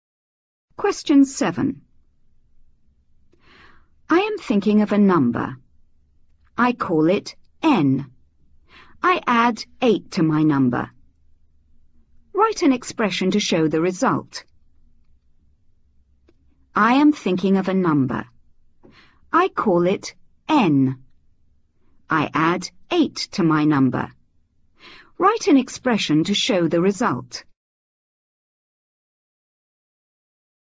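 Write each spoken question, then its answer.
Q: Write an expression to show the result.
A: N + 8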